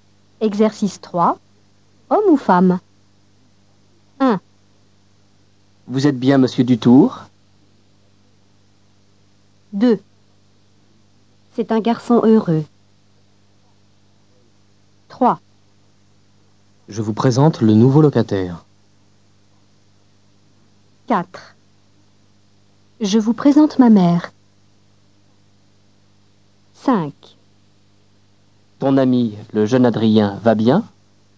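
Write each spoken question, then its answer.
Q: Vous êtes bien monsieur Dutour ?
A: homme

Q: C'est un garçon heureux.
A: homme

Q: Je vous présente le nouveau locataire.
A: homme

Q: Je vous présente ma mère.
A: femme

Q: Ton ami, le jeune Adrien, va bien ?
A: homme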